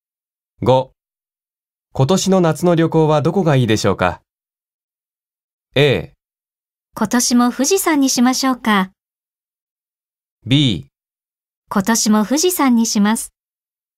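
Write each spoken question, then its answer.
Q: 今年の夏の旅行はどこがいいでしょうか?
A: A: 今年も富士山にしましょうか。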